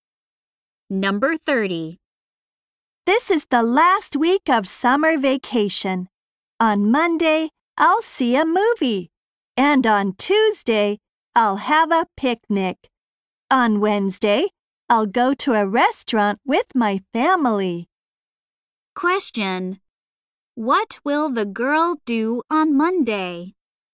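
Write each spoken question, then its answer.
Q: What will the girl do on Monday?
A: See a movie.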